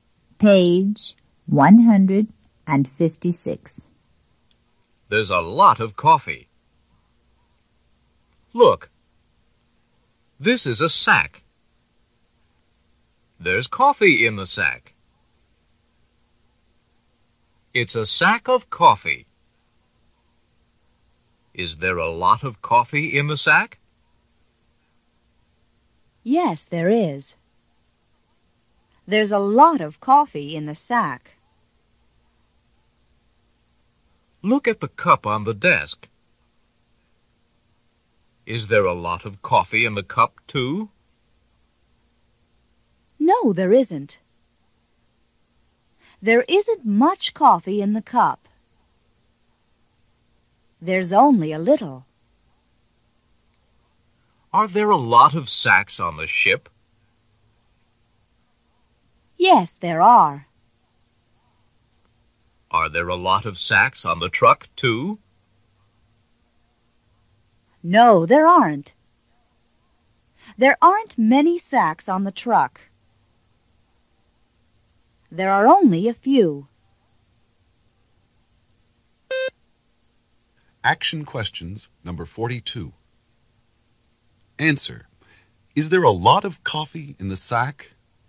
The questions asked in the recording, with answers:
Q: Is there a lot of coffee in the sack?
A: Yes, there is.